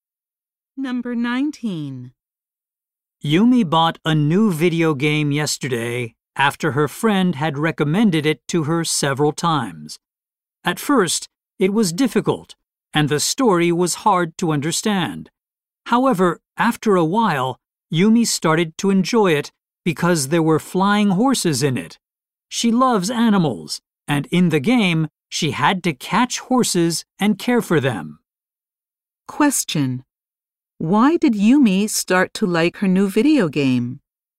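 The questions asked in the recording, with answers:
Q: Why did Yumi start to like her new video game?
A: It had flying horses she could catch and care for.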